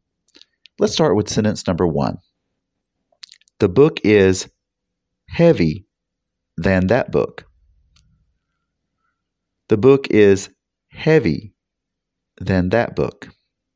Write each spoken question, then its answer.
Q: The book is heavy than that book.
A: Did you say heavier? That is correct.